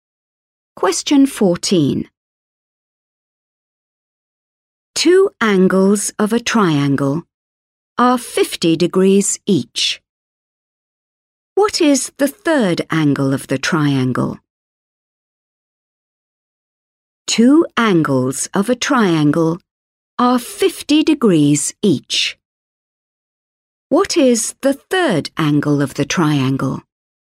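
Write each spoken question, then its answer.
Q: What is the third angle of the triangle?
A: 80 degrees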